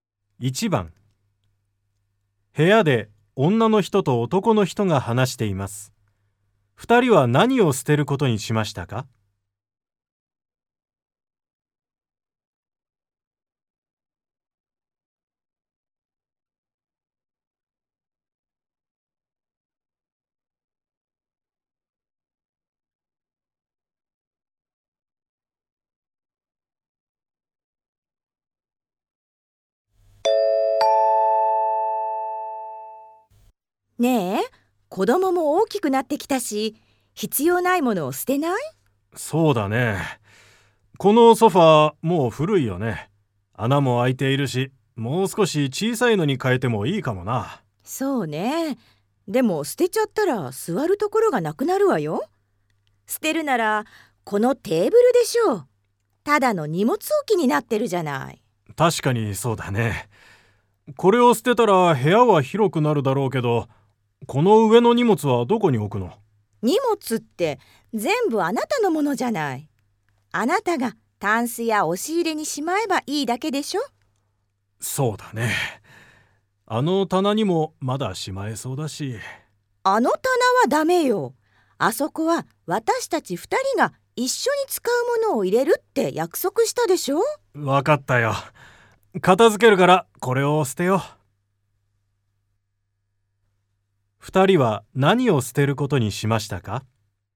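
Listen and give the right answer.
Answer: テーブル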